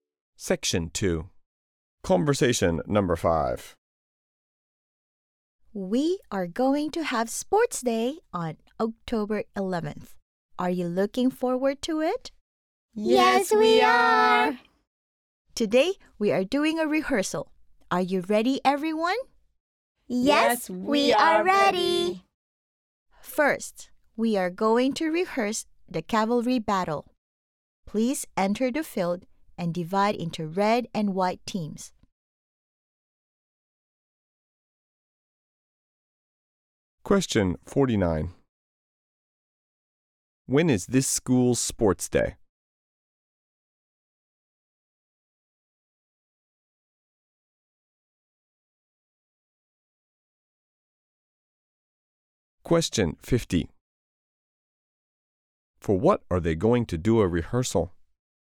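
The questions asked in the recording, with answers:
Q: When is this school's sports day?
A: October 11th

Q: For what are they going to do a rehearsal?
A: The cavalry battle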